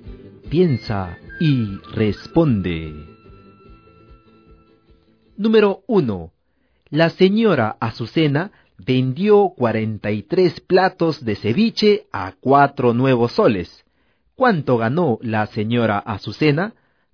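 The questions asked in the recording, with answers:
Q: ¿Cuánto ganó la señora Azucena?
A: 172 nuevos soles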